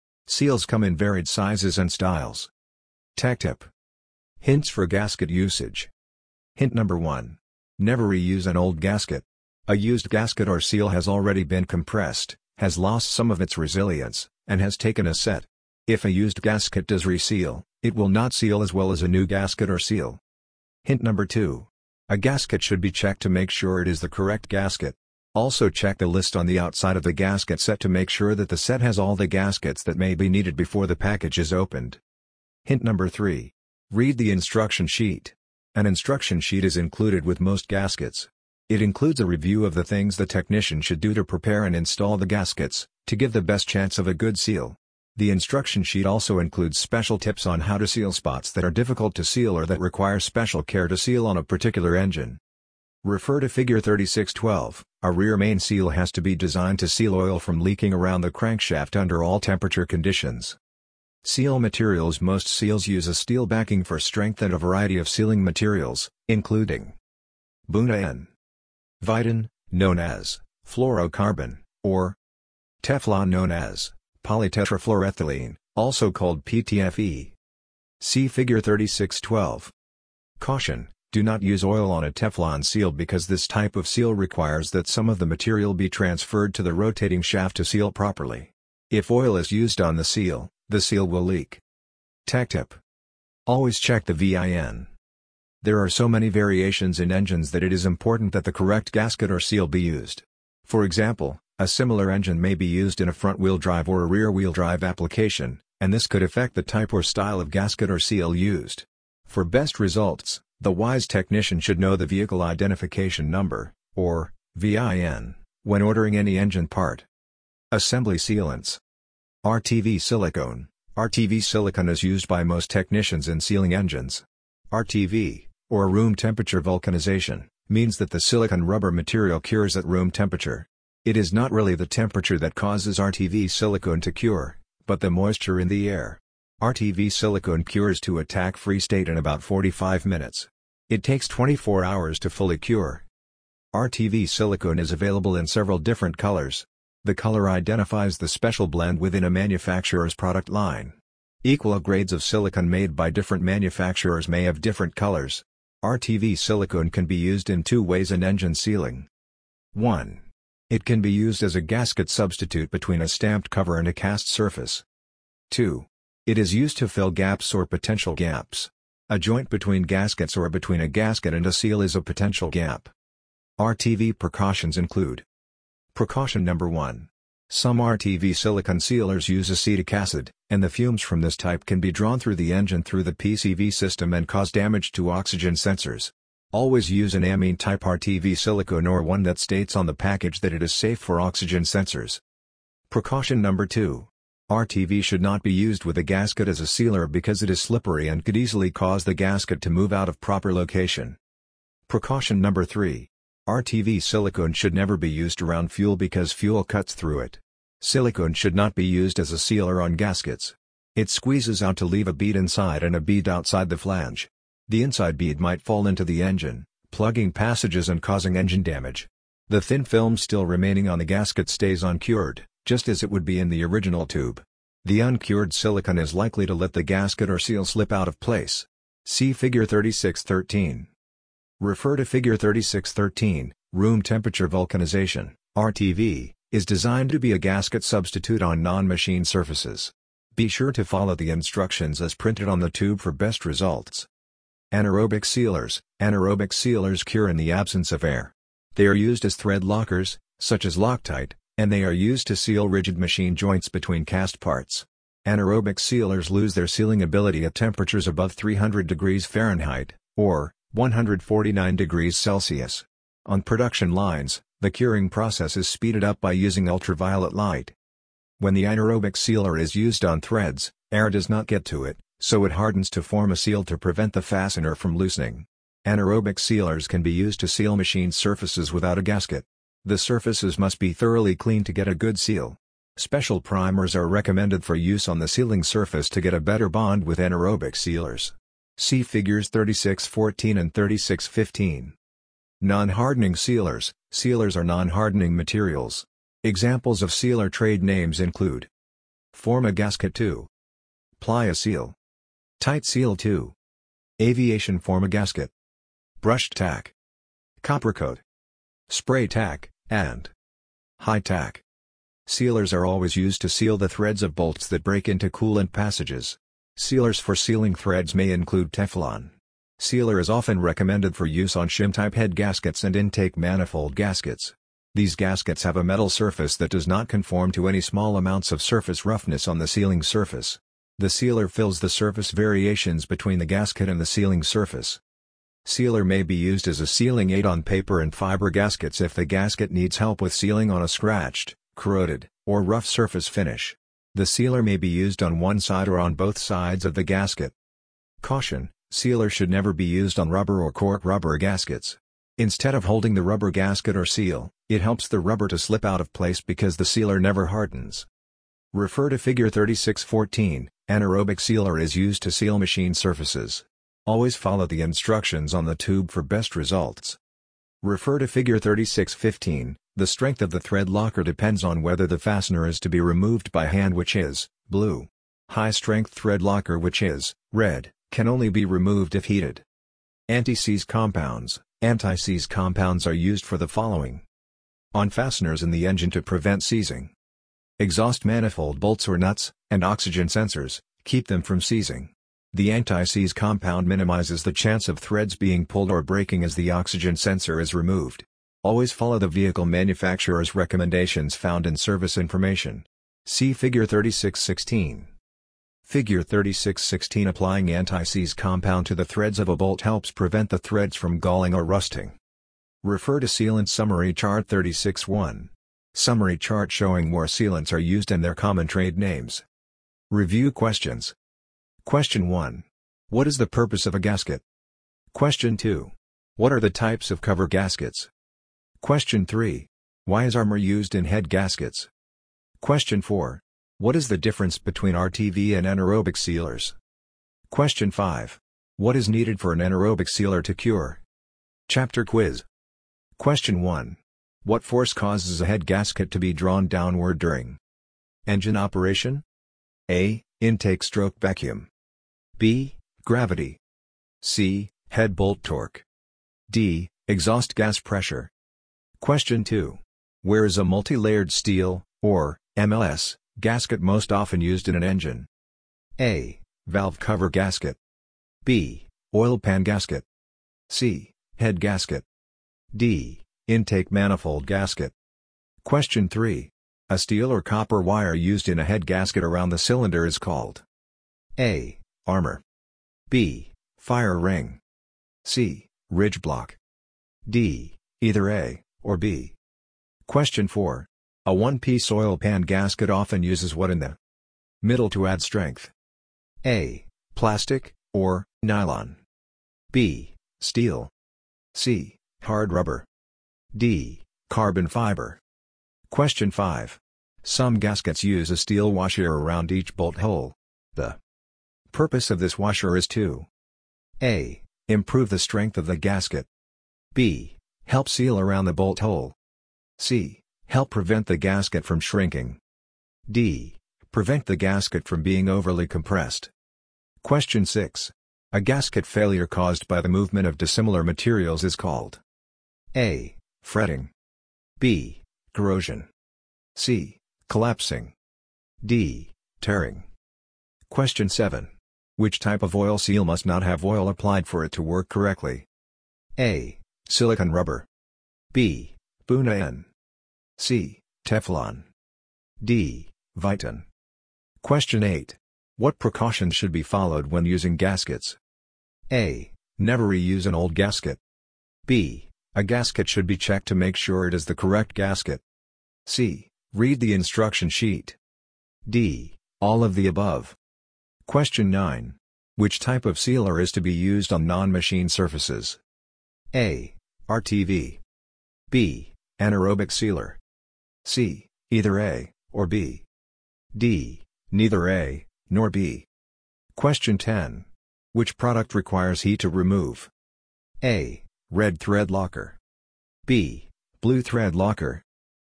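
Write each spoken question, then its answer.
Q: What is the difference between RTV and anaerobic sealers?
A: RTV silicone cures with moisture in the air; anaerobic sealers cure in the absence of air

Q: What is needed for an anaerobic sealer to cure?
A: The absence of air

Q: Which type of oil seal must not have oil applied for it to work correctly?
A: C: Teflon

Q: What precautions should be followed when using gaskets?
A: D: All of the above

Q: Which type of sealer is to be used on non-machine surfaces?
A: A: RTV

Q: Which product requires heat to remove?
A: A: Red thread locker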